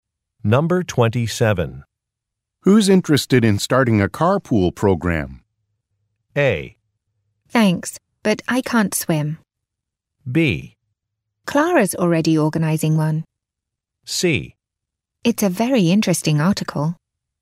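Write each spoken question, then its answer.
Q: Who's interested in starting a carpool program?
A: B: Clara's already organizing one.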